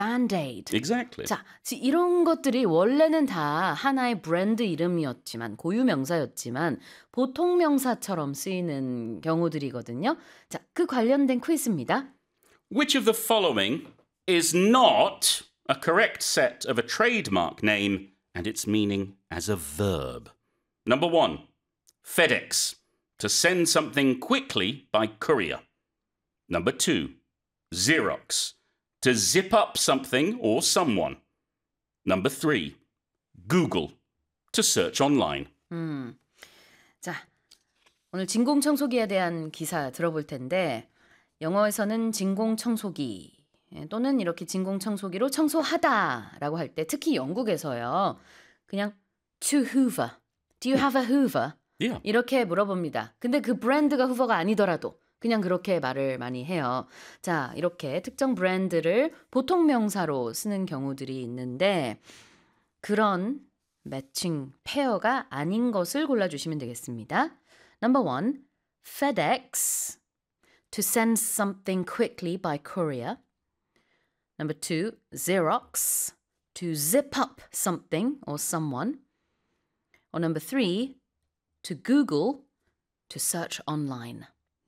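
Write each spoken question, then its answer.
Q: Which of the following is not a correct set of a trademark name and its meaning as a verb?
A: 2: Xerox, to zip up something or someone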